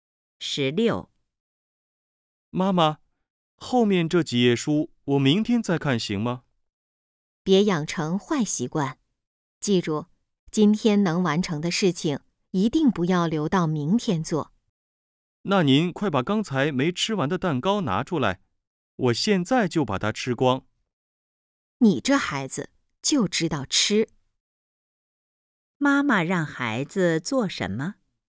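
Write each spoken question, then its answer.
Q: 妈妈让孩子做什么?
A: 今天把后面几页书看完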